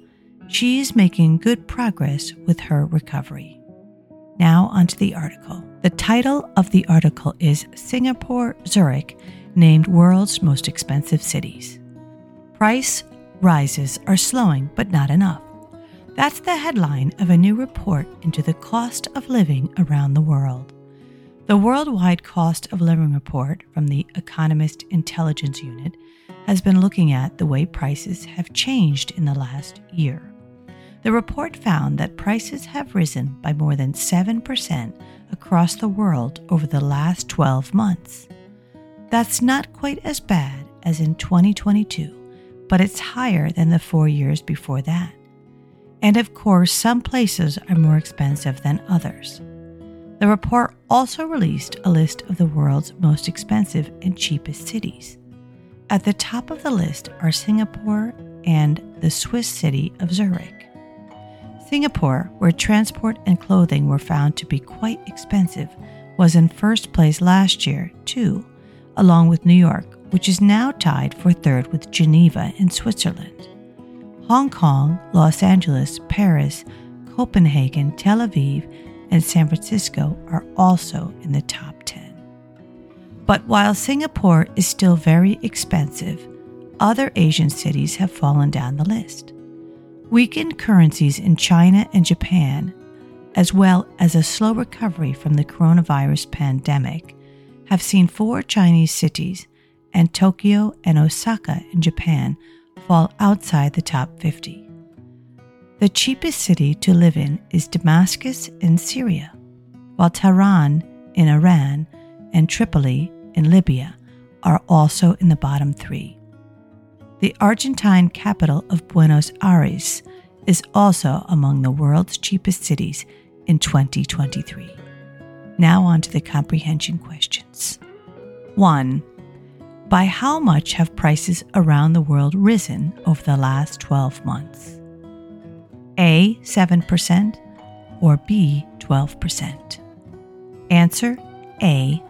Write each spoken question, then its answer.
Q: By how much have prices around the world risen over the last 12 months?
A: A. 7%.